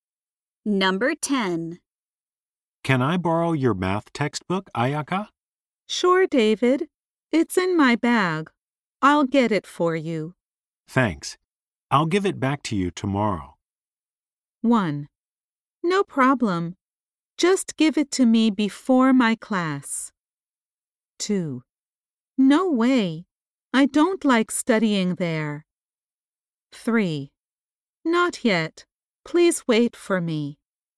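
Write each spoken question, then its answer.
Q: Thanks. I'll give it back to you tomorrow.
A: 1: No problem. Just give it to me before my class.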